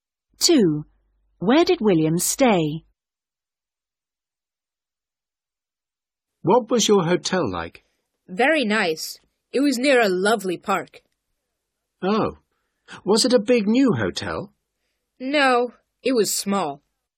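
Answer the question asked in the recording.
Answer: In a small hotel near a park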